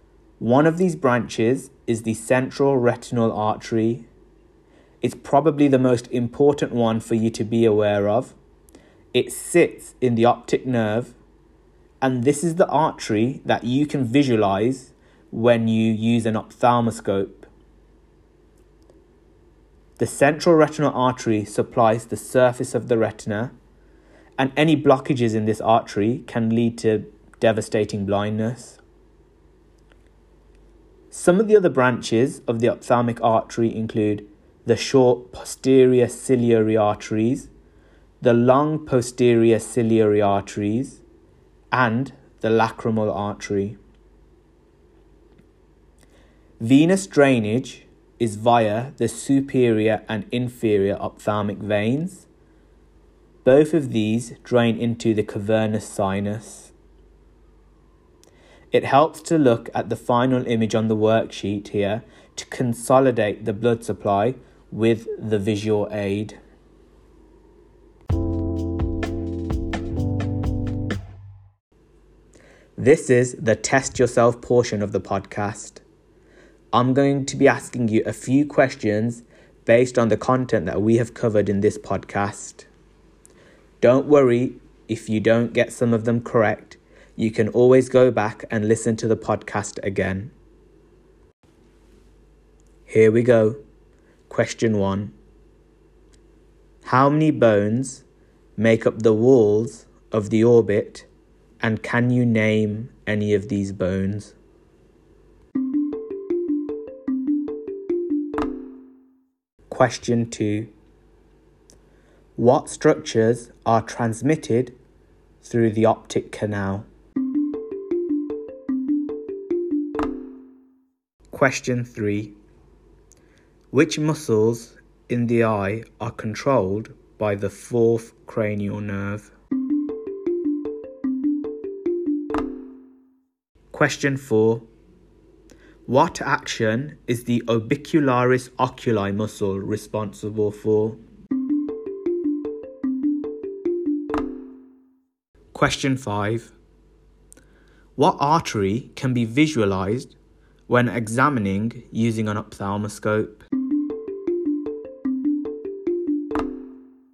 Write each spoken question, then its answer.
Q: What artery can be visualized when examining using an ophthalmoscope?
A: This is, of course, the central retinal artery.